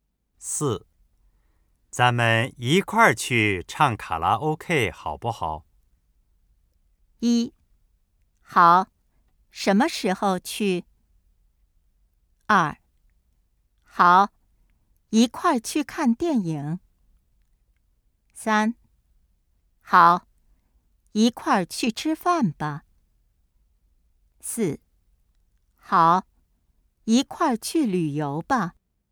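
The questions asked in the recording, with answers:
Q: 咱们一块儿去唱卡拉 OK 好不好?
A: 一: 好,什么时候去?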